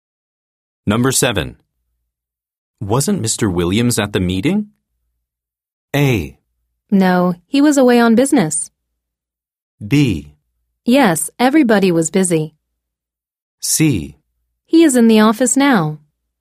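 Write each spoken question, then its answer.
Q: Wasn't Mr. Williams at the meeting?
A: A: No, he was away on business.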